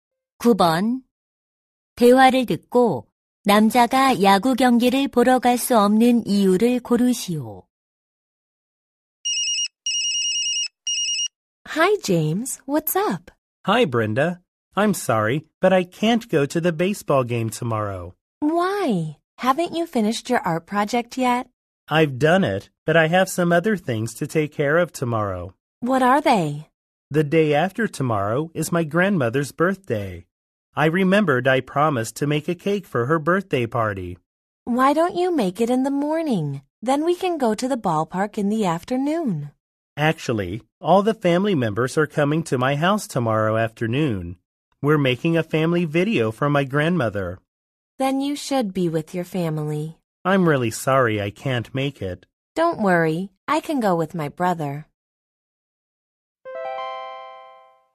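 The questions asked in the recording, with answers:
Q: 대화를 듣고 남자가 야구 경기를 보러 갈 수 없는 이유를 고르시오.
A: 할머니를 위한 가족 영상을 만들어야 해서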